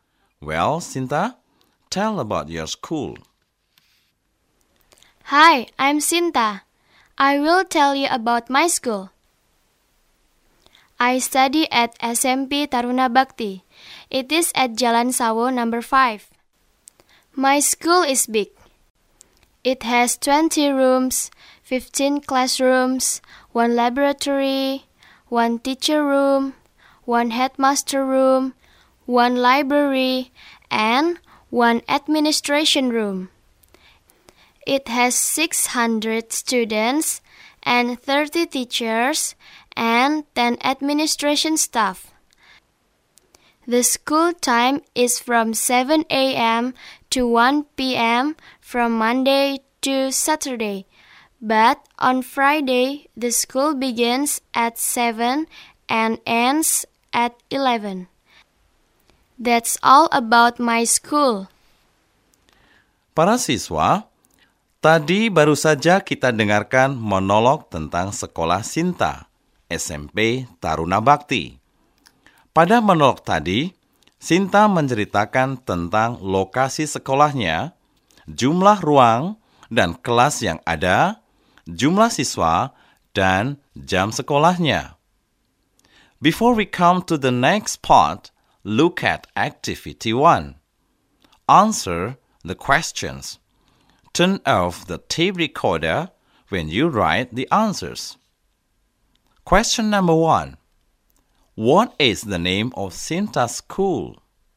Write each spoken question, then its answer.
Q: What is the name of Sinta's school?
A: The answer is SMP Taruna Bakti.